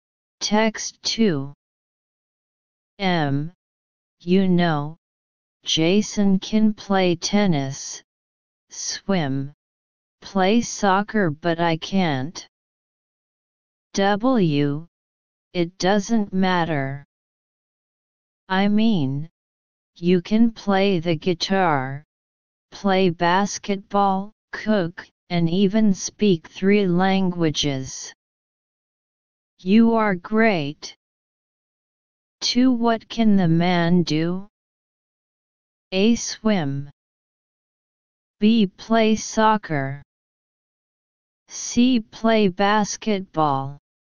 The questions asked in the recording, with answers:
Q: what can the man do?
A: Answer C.